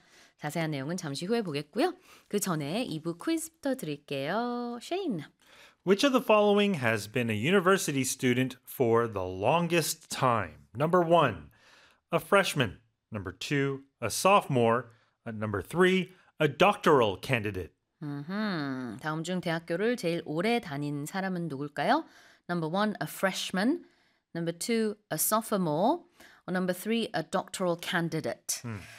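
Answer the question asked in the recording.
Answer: 3: a doctoral candidate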